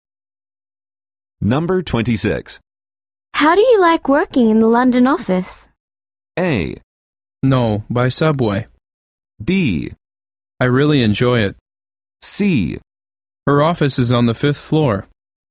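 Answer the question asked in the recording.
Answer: B: I really enjoy it.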